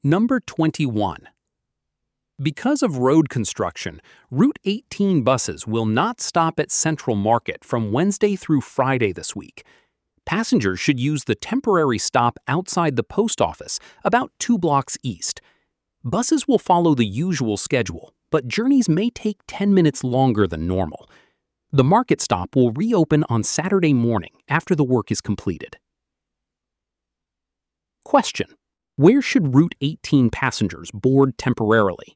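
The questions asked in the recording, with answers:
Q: where should Route 18 passengers board temporarily?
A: At the temporary stop outside the post office, about 2 blocks east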